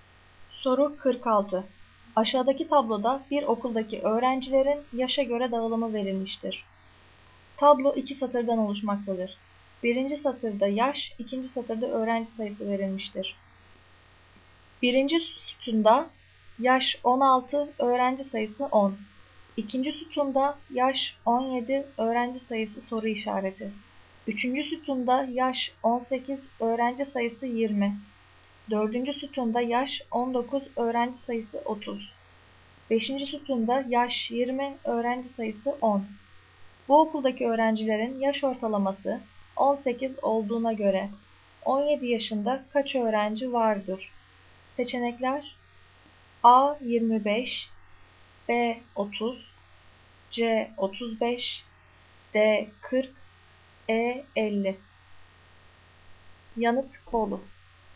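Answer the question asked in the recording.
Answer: B: 30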